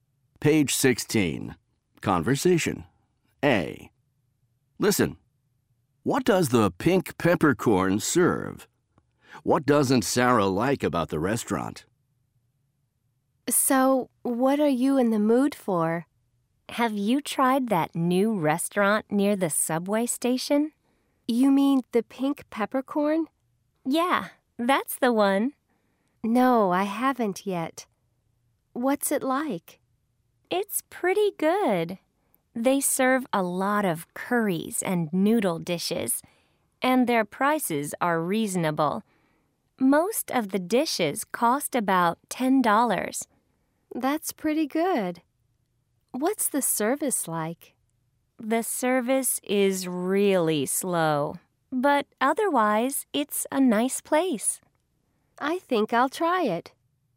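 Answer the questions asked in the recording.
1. Curries and noodle dishes
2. The service is really slow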